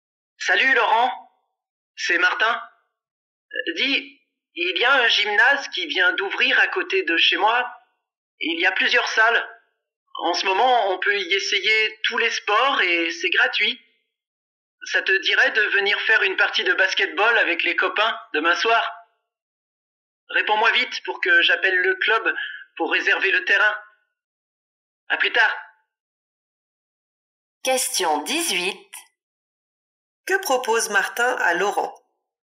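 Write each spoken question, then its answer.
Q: Que propose Martin à Laurent?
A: De venir jouer au basketball avec les copains demain soir au nouveau gymnase.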